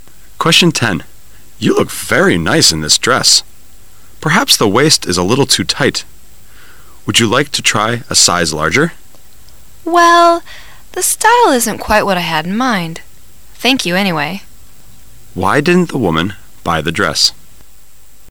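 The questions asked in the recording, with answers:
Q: Why didn't the woman buy the dress?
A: The style wasn't what she had in mind.

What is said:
[解析] M: You look very nice in this dress. Perhaps the waist is little too tight. Would you like to try a size larger? W: Well, the style isn't quite what I had in mind. Thank you anyway. Q: Why didn't the woman buy the dress?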